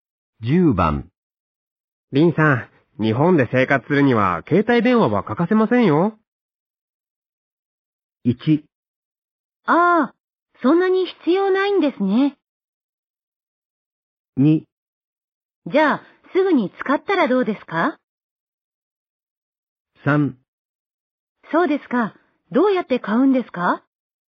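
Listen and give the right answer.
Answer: 3: そうですか。どうやって買うんですか?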